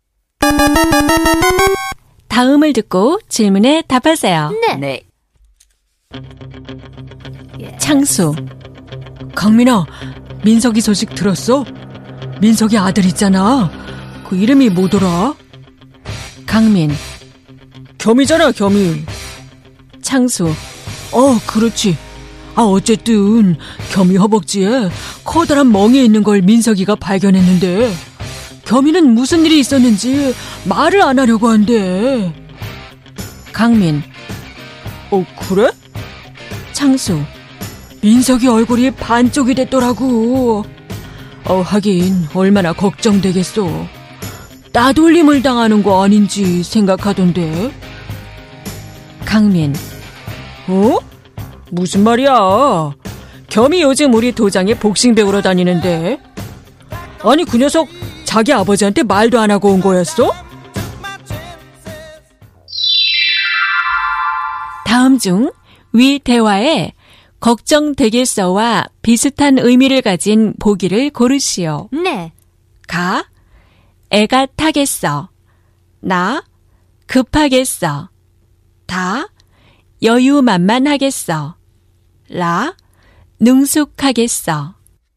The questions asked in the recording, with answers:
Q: 다음 중 위 대화에 걱정되겠어와 비슷한 의미를 가진 보기를 고르시오.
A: So the answer is 가, 애가 타겠어.